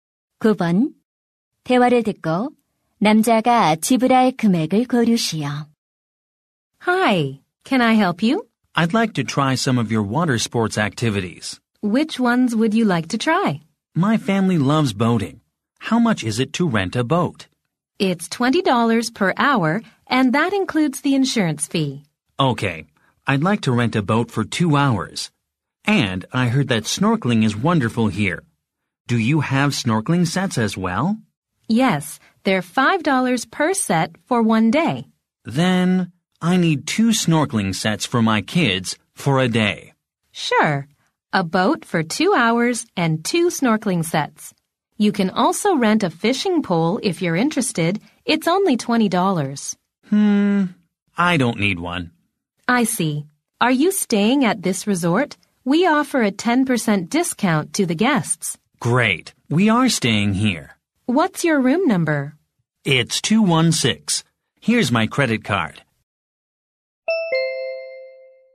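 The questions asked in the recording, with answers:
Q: 대화를 듣고 남자가 지불할 금액을 고르시오.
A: $45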